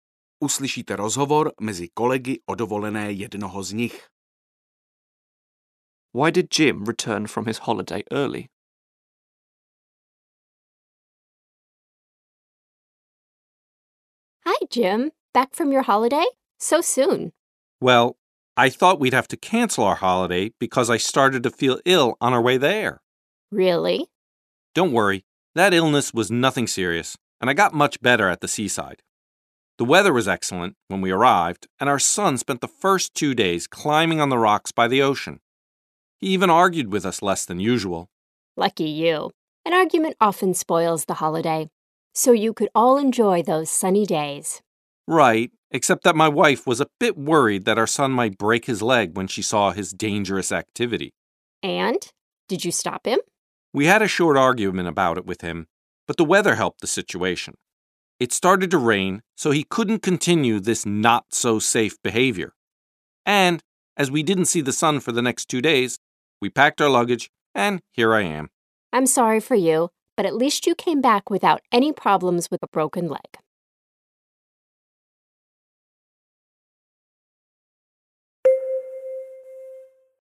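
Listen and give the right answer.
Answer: Because the weather turned bad: it rained and they didn't see the sun for two days.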